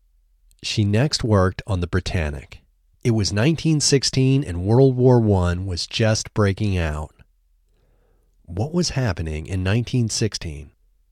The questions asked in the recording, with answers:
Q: What was happening in 1916?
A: In 1916, World War I was just breaking out.